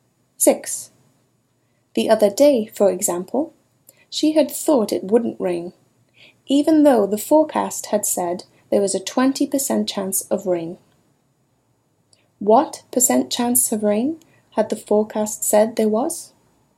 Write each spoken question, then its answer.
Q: What percent chance of rain had the forecast said there was?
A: The forecast had said there was a 20% chance of rain.